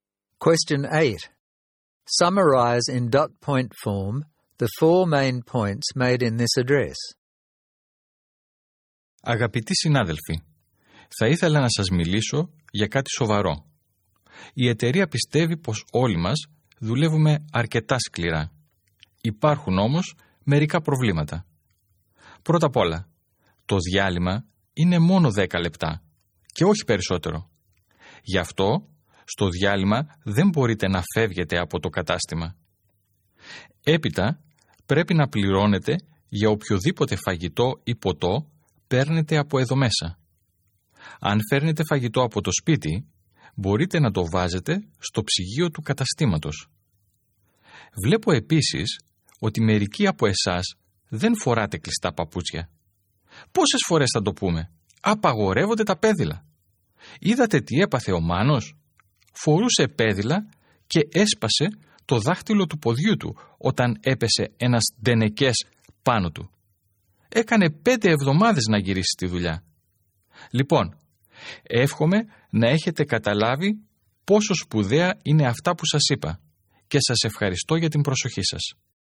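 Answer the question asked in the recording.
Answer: Break is only 10 minutes and staff cannot leave the store; food or drink taken from the store must be paid for; food from home can go in the store fridge; closed shoes must be worn, sandals are banned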